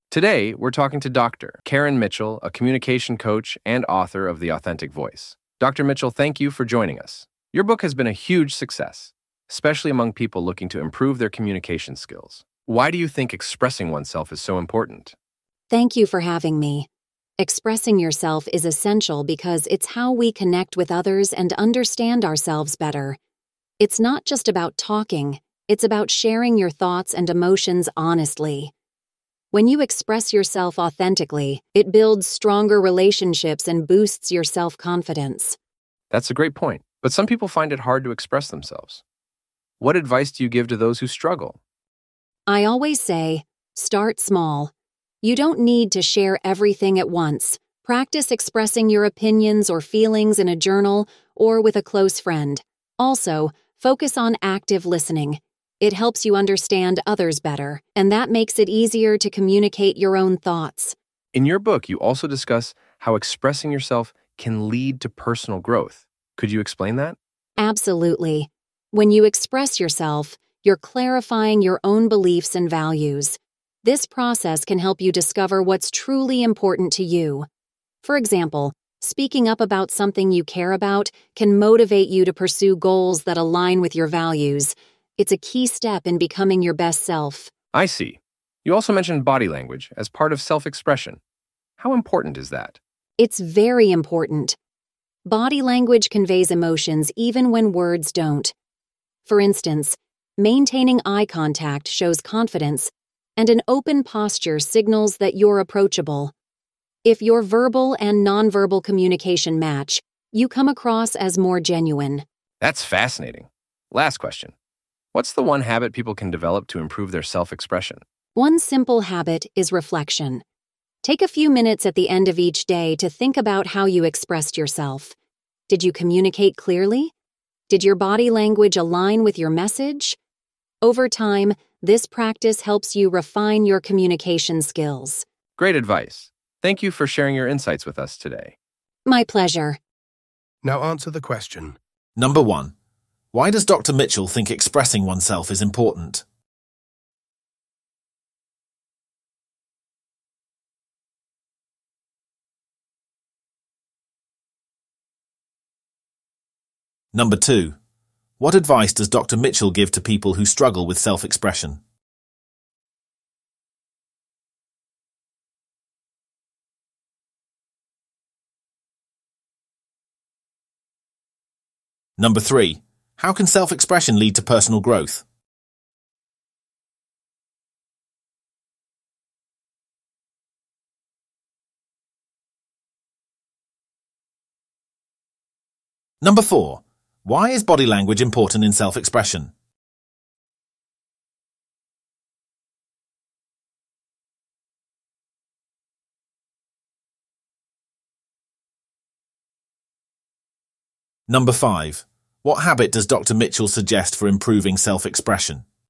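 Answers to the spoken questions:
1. It's how we connect with others and understand ourselves better; it builds stronger relationships and self-confidence
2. Start small: practice in a journal or with a close friend, and focus on active listening
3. It clarifies your beliefs and values, helping you discover what's important and pursue goals aligned with them
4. It conveys emotions even when words don't; matching verbal and nonverbal communication makes you seem genuine
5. Reflection: thinking at the end of each day about how you expressed yourself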